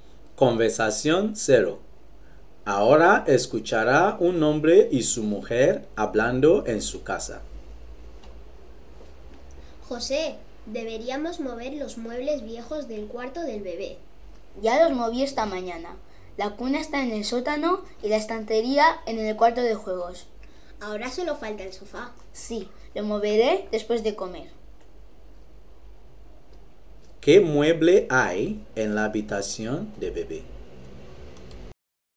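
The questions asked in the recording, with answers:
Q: ¿Qué mueble hay en la habitación de bebé?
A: el sofá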